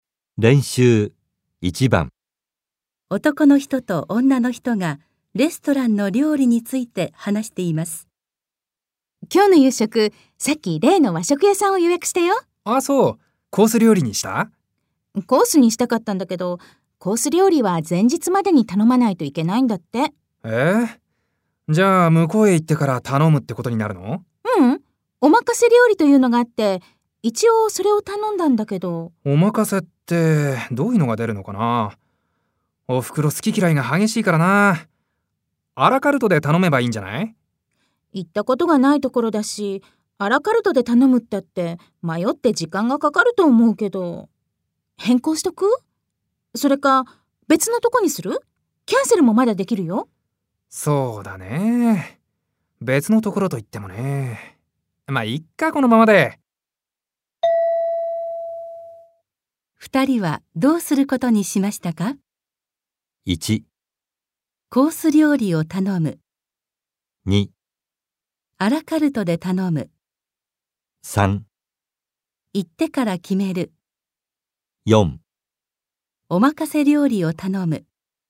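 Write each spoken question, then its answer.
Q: 二人はどうすることにしましたか?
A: 4: おまかせ料理を頼む。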